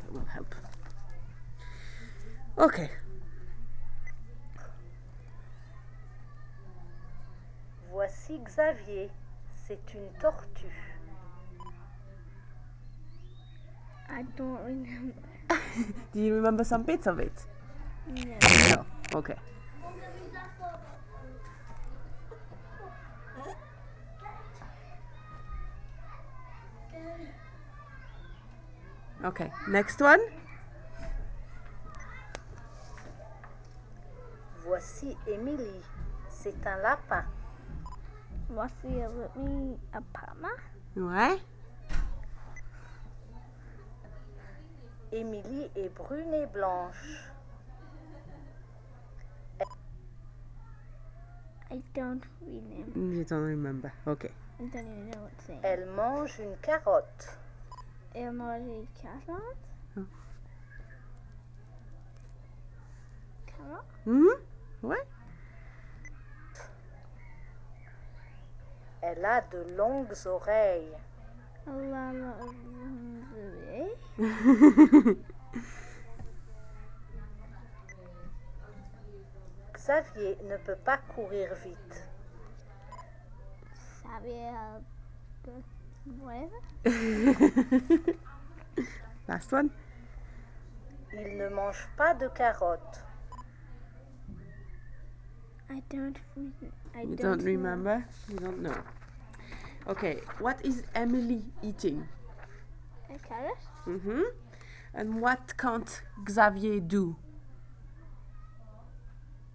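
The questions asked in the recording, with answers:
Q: what is Emily eating?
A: A carrot

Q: And what can't Xavier do?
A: Run fast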